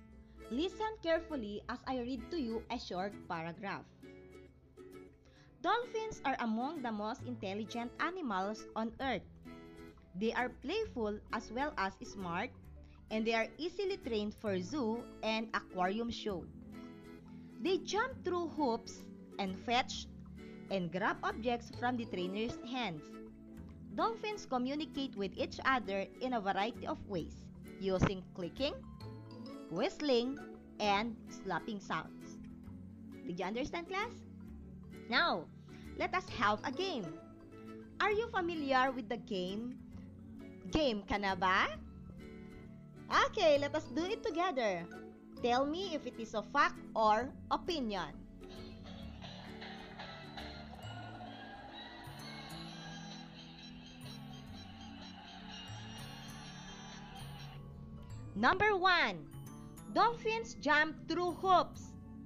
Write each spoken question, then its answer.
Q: Dolphins jump through hoops.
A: Correct, it is a fact.